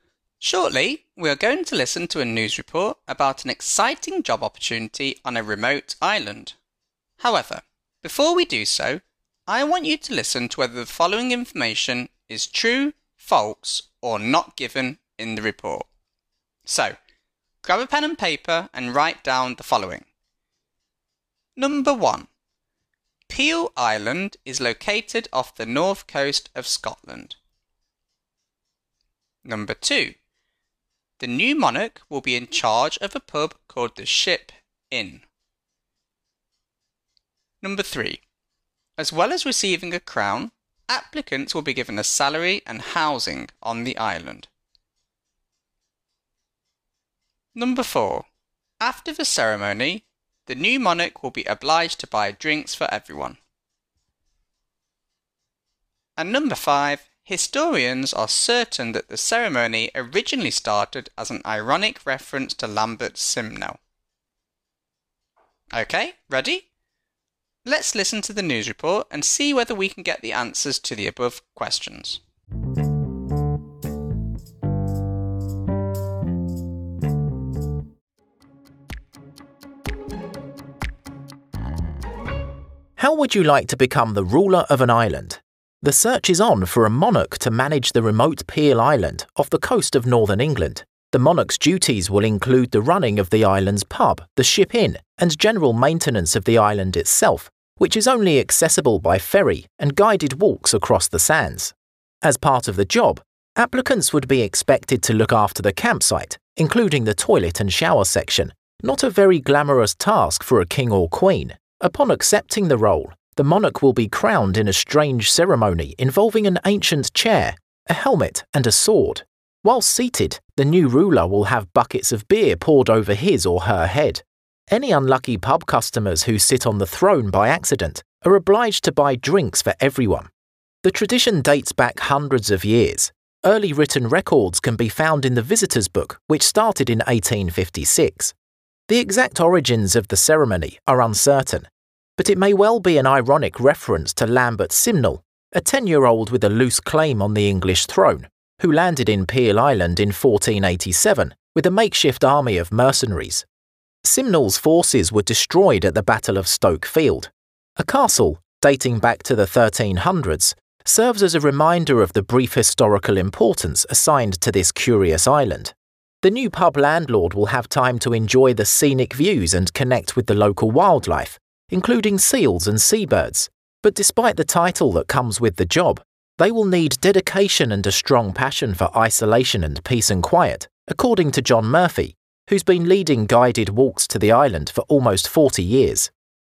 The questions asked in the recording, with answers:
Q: Peel Island is located off the north coast of Scotland.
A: As we heard, this is false.

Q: The new monarch will be in charge of a pub called the Ship Inn.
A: This is in fact true.

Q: As well as receiving a crown, applicants will be given a salary and housing on the island.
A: Actually, this is not given in the news report.

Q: After the ceremony, the new monarch will be obliged to buy drinks for everyone.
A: This is false.

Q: Historians are certain that the ceremony originally started as an ironic reference to Lambert Simnel.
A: This is false.